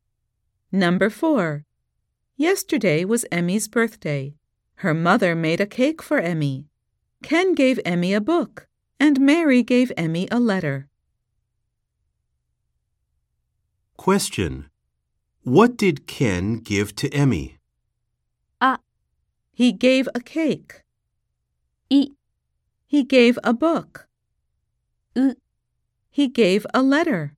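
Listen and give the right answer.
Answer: B: He gave a book.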